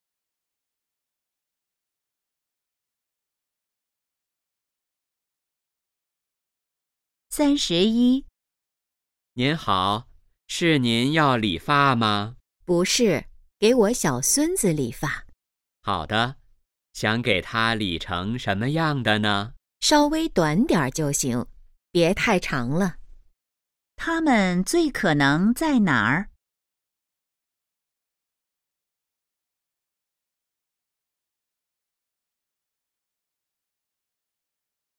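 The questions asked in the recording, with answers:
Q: 它们最可能在哪儿?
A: 理发店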